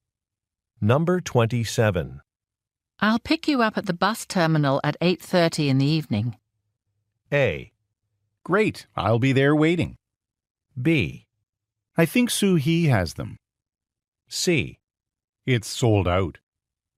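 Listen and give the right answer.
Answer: A: Great, I'll be there waiting.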